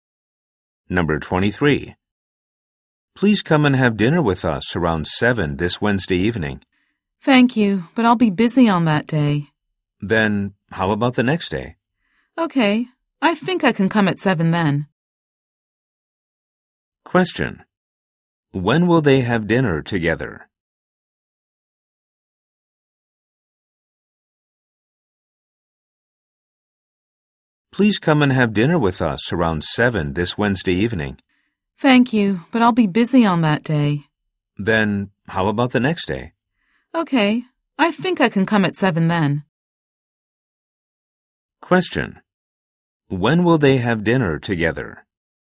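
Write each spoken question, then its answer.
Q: When will they have dinner together?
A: Thursday evening at 7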